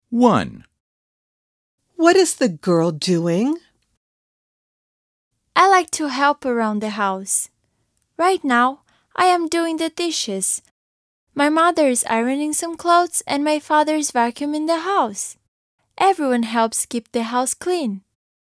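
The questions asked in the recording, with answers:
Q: What is the girl doing?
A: the dishes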